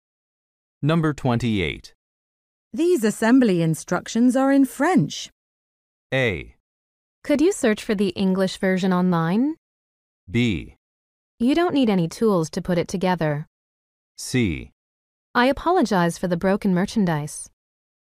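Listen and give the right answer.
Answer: A: Could you search for the English version online?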